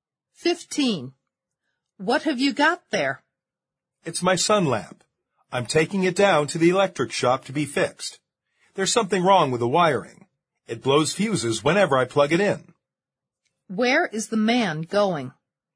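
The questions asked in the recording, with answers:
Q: Where is the man going?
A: To the electric shop to get his sun lamp fixed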